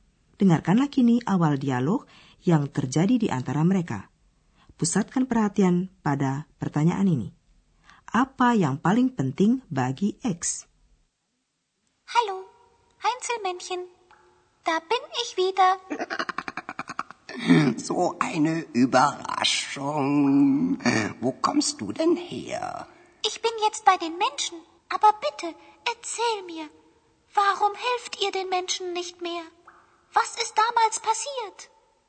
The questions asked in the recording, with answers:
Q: Apa yang paling penting bagi X?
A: Ia ingin mengetahui mengapa para Hansel Mansion tidak membantu manusia lagi, kejadian apa yang menyebabkan perubahan itu.